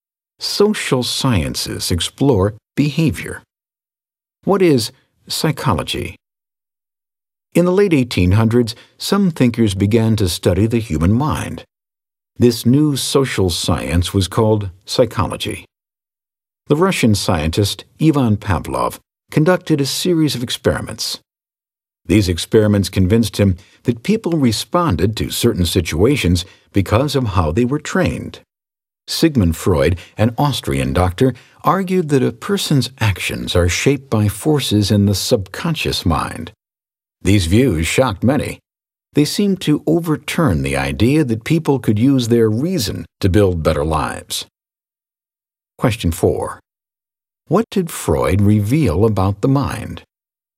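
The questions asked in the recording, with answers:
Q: What did Freud reveal about the mind?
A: A person's actions are shaped by forces in the subconscious mind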